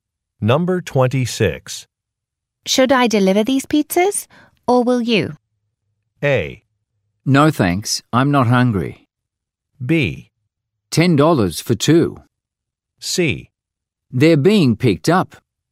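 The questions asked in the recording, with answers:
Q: Should I deliver these pizzas, or will you?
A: C: They're being picked up.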